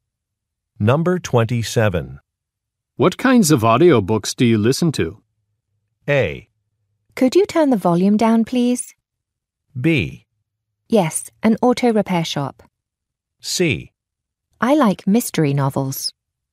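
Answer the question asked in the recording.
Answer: C: I like mystery novels.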